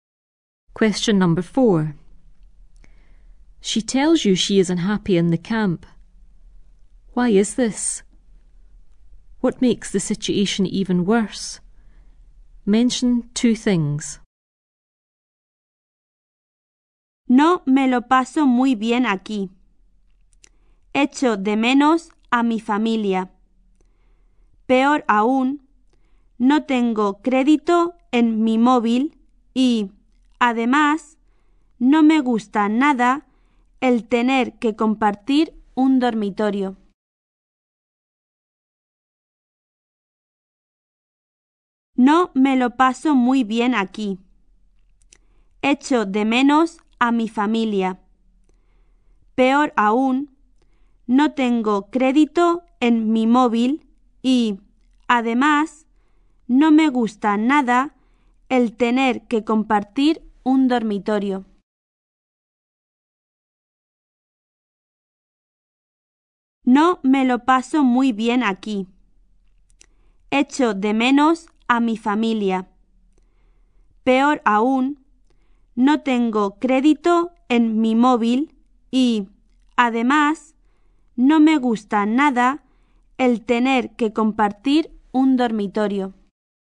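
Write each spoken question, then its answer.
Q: Why is this?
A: She misses her family

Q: What makes the situation even worse?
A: She has no credit on her mobile and she doesn't like sharing a bedroom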